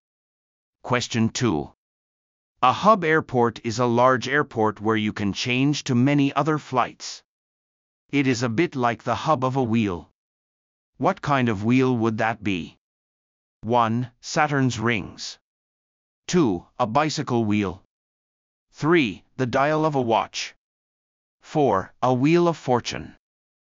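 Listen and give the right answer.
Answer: 2: A bicycle wheel.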